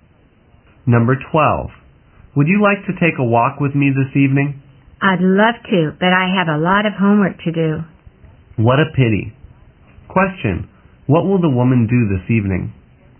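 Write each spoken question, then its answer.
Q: What will the woman do this evening?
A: Do her homework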